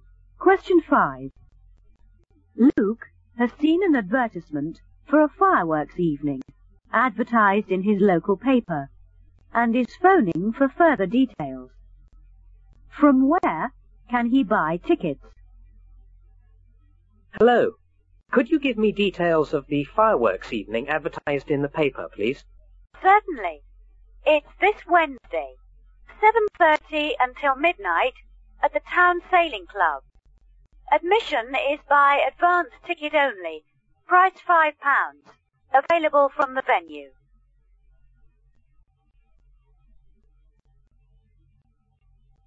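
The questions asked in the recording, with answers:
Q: From where can he buy tickets?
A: From the venue, the Town Sailing Club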